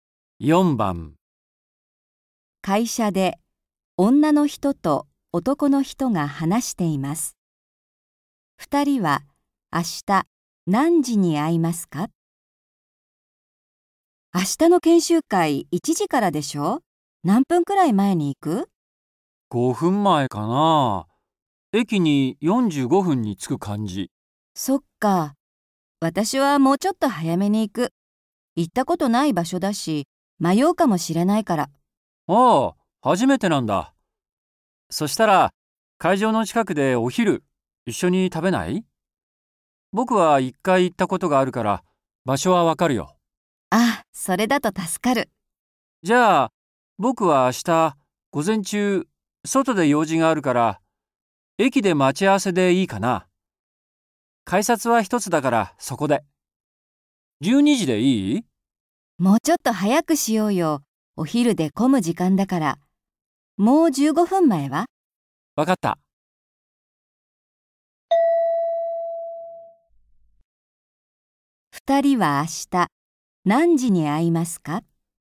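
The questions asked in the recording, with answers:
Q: 二人は明日何時に会いますか?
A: 11時45分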